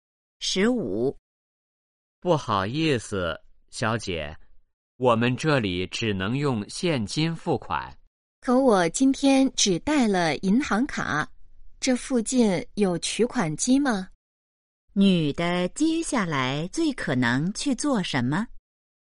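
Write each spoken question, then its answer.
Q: 女的接下来最可能去做什么?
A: 去取款机取钱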